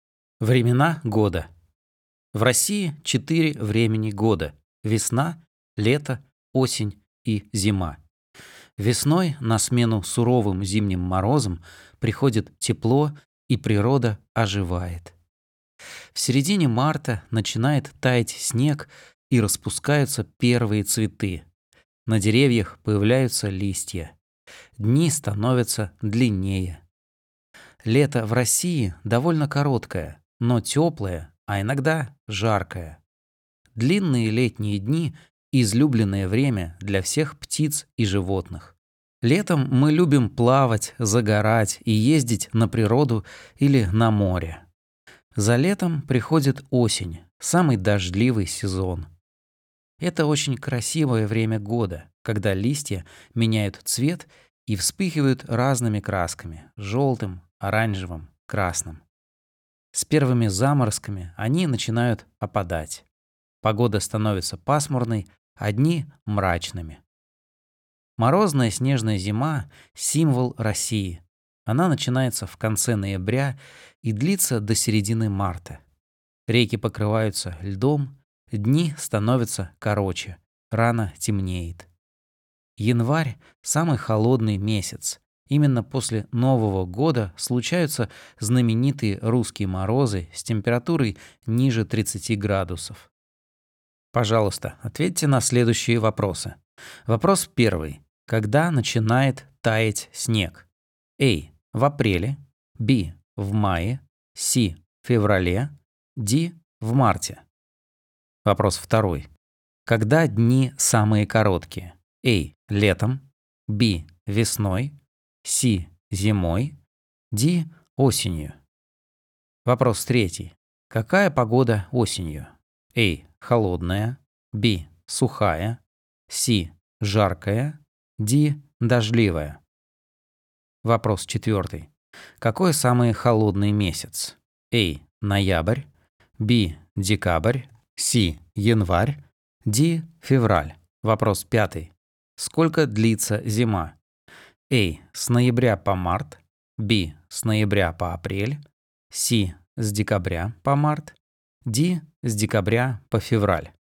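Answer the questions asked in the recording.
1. D: В марте.
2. C: Зимой.
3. D: Дождливая.
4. C: Январь.
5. A: С ноября по март.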